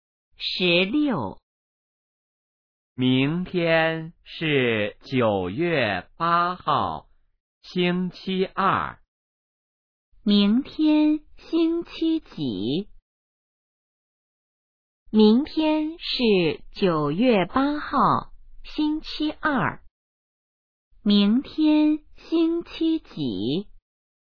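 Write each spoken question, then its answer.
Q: 明天星期几?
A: 星期二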